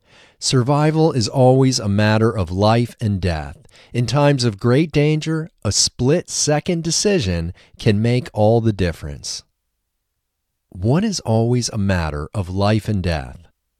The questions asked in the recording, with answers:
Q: What is always a matter of life and death?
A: Survival is always a matter of life and death.